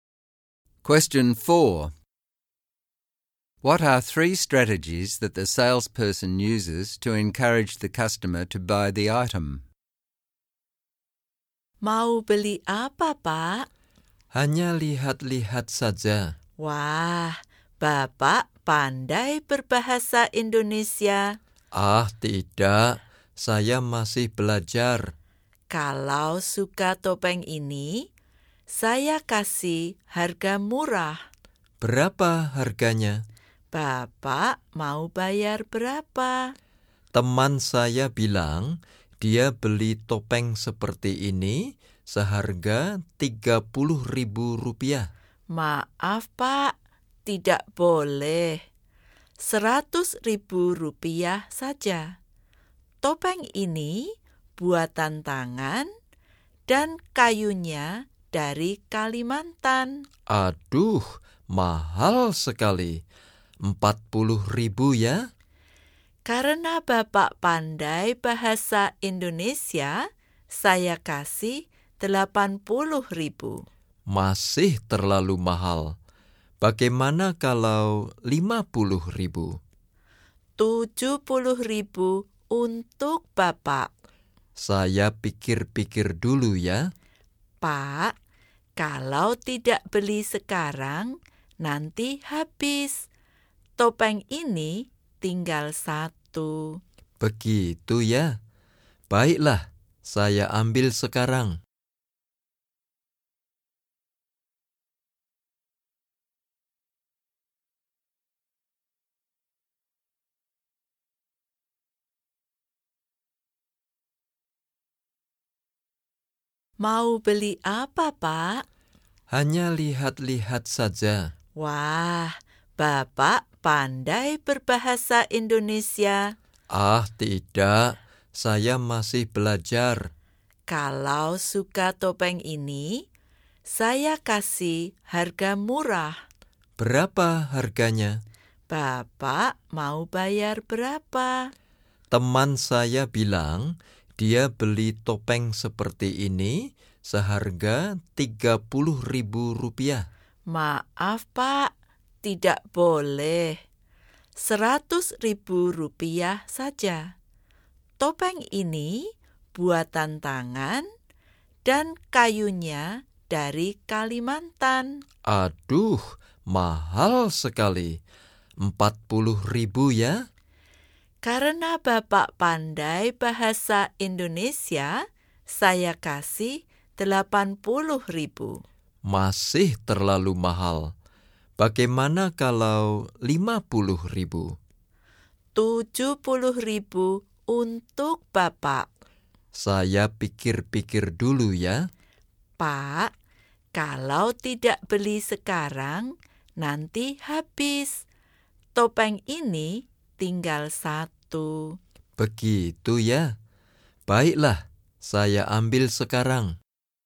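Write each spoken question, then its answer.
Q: What are 3 strategies that the salesperson uses to encourage the customer to buy the item?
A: She flatters his Indonesian and offers a discount because of it. She stresses the quality: the mask is handmade from Kalimantan wood. She creates urgency: it is the last one and will be gone if he does not buy now.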